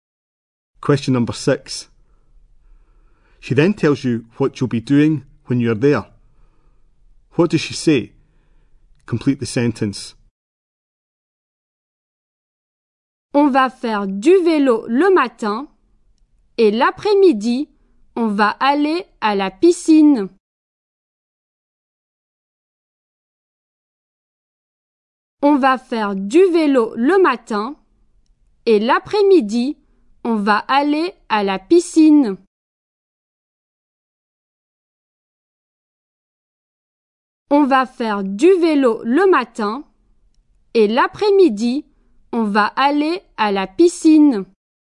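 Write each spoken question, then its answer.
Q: What does she say?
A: Cycling in the morning, swimming pool in the afternoon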